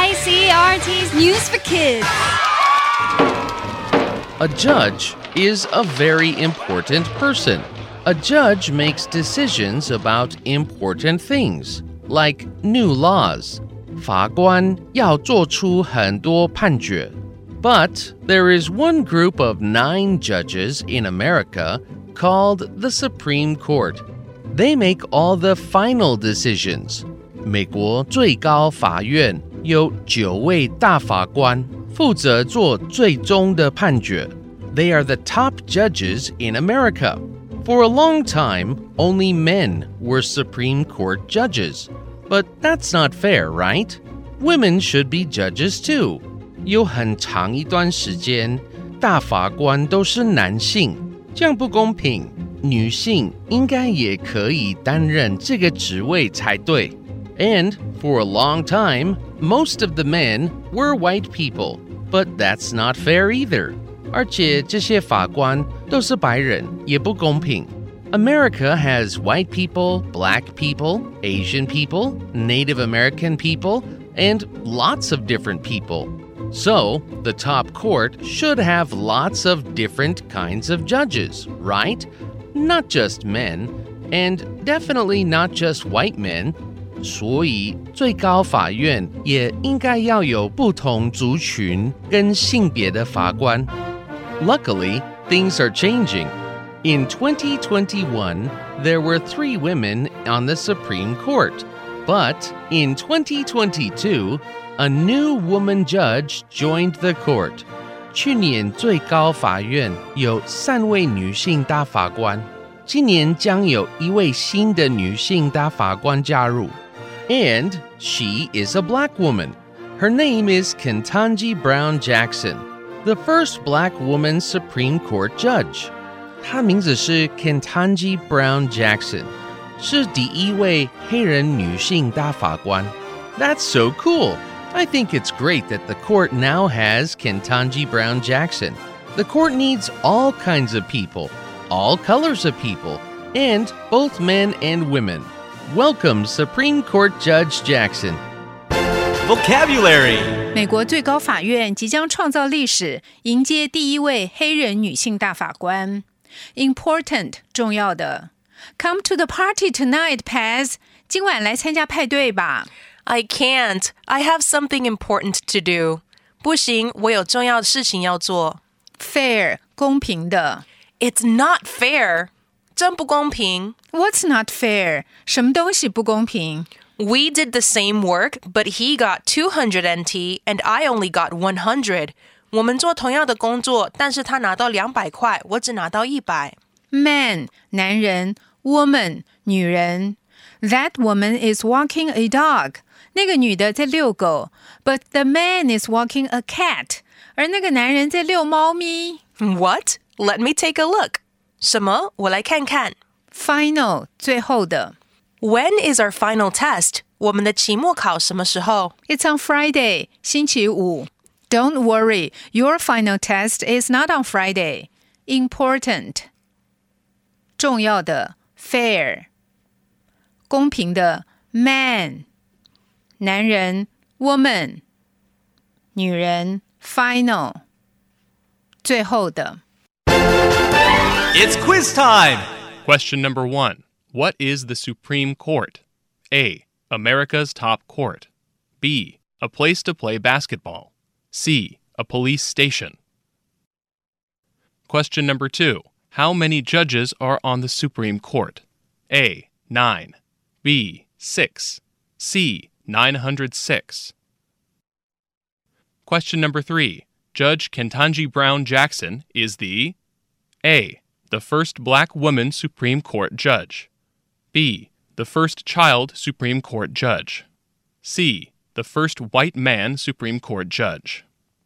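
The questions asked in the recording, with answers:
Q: What is the Supreme Court?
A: A: America's top court

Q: How many judges are on the Supreme Court?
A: A: 9

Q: Judge Kentanji Brown Jackson is the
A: A: The first black woman Supreme Court judge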